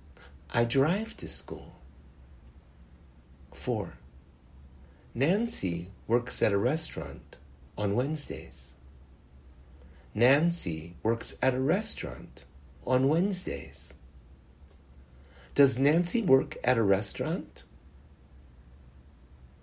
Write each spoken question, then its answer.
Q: Does Nancy work at a restaurant?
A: Yes, Nancy works at a restaurant.